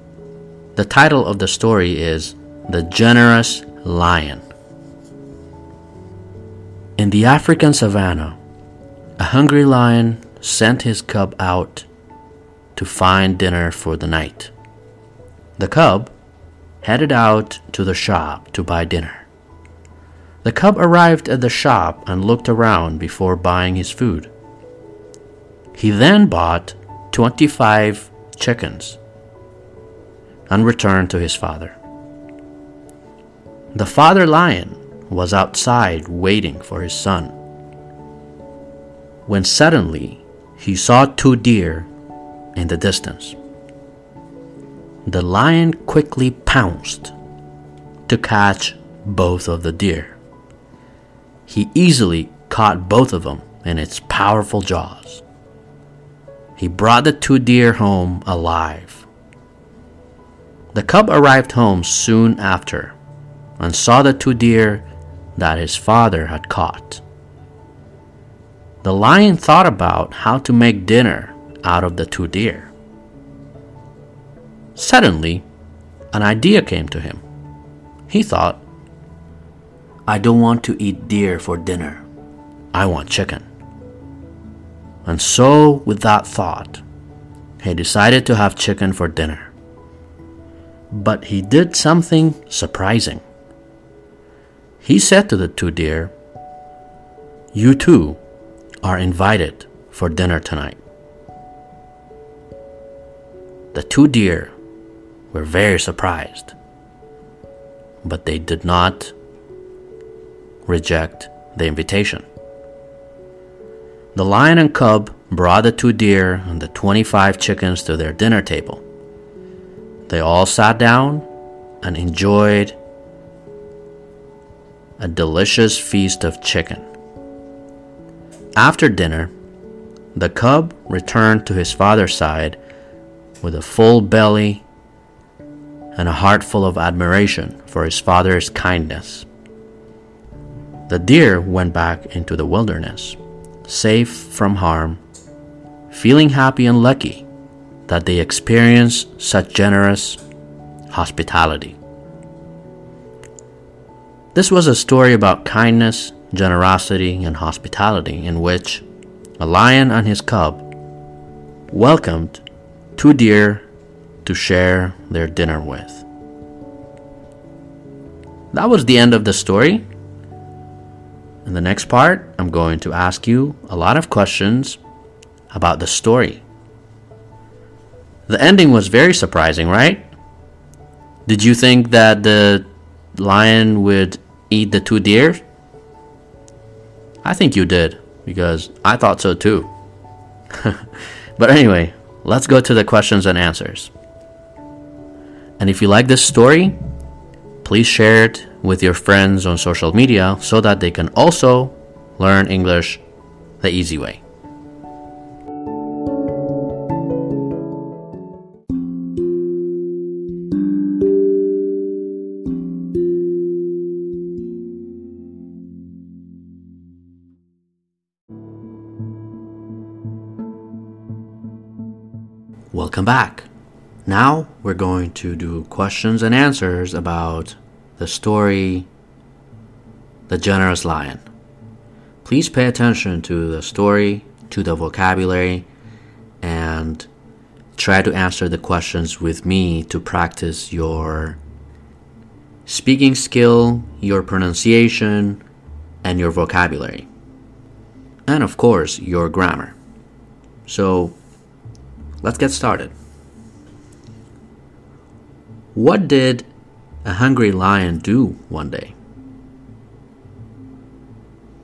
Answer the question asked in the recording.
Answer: A hungry lion sent out his baby cub.